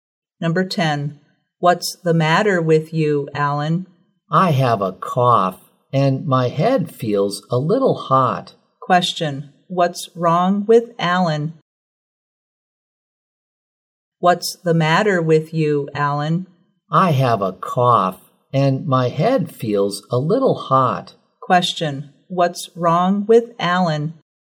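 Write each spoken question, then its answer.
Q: What's wrong with Alan?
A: He has a cough and a slight fever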